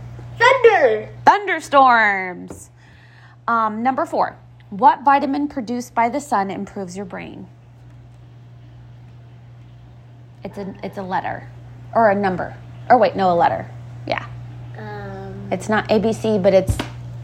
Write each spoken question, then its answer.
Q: What vitamin produced by the sun improves your brain?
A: It's D. Vitamin D.